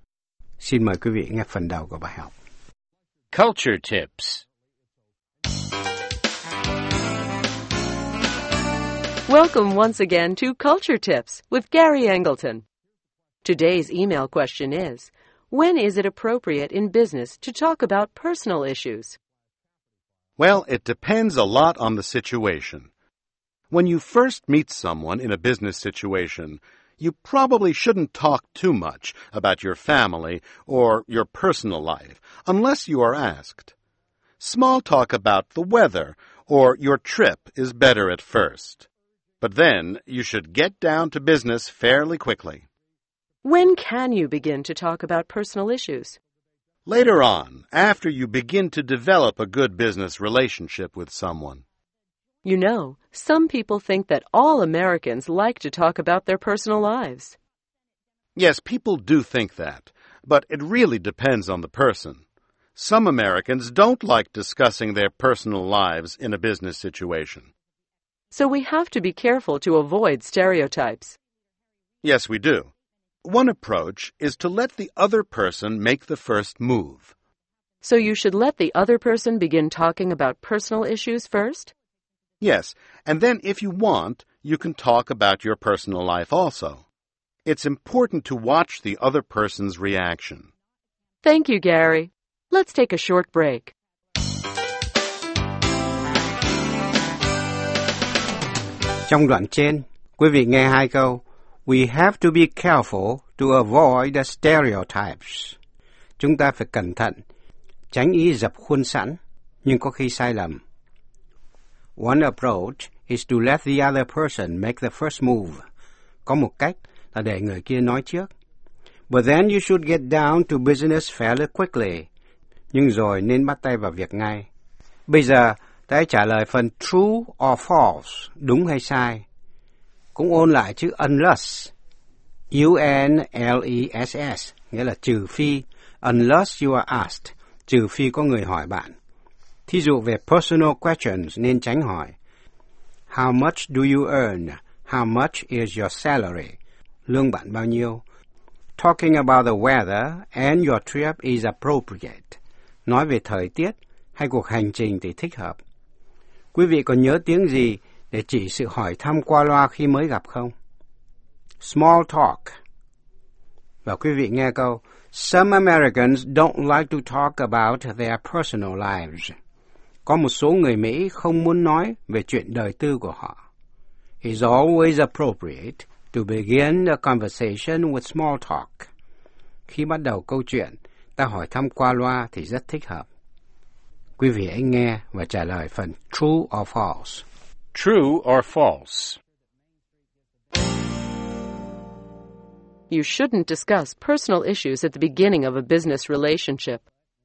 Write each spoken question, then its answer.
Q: You shouldn't discuss personal issues at the beginning of a business relationship.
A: True. Later on in the relationship, it may be okay.